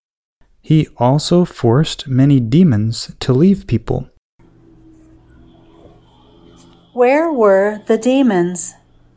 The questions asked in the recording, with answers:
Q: Where were the demons?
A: The demons were in the people.